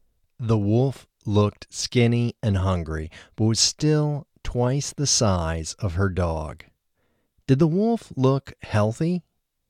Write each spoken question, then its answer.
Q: Did the wolf look healthy?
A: No, the wolf didn't look healthy.